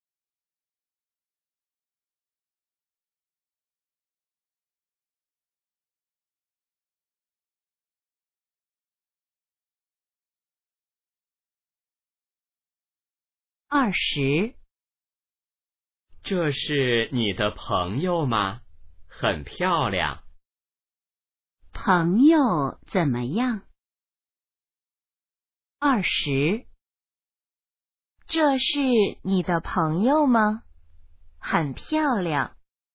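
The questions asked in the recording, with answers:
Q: 朋友怎么样?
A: 很漂亮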